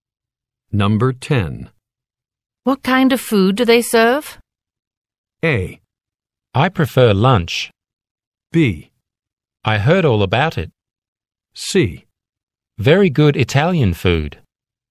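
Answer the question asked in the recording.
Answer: C: Very good Italian food.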